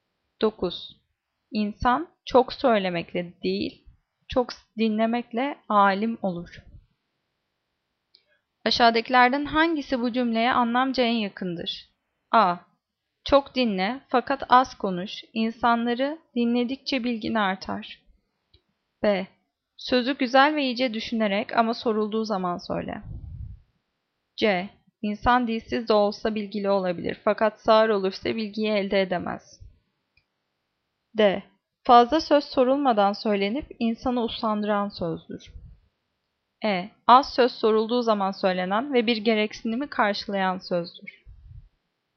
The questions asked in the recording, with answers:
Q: Aşağıdakilerden hangisi bu cümleye anlamca en yakındır?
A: Cevap A. Çok dinle fakat az konuş, insanları dinledikçe bilgin artar.